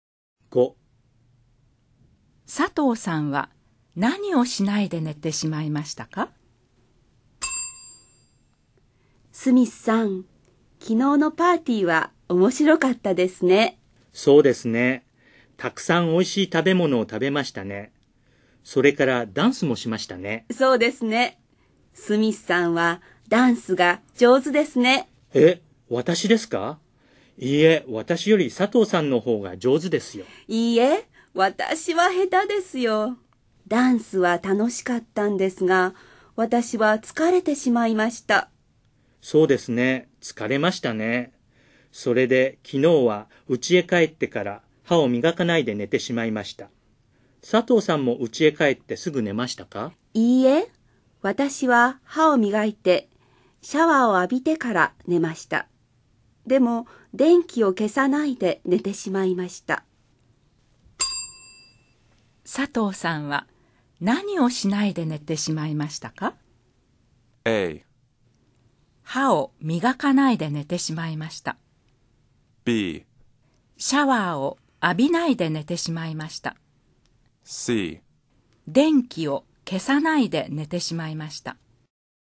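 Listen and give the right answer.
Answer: C: 電気を消さないで寝てしまいました。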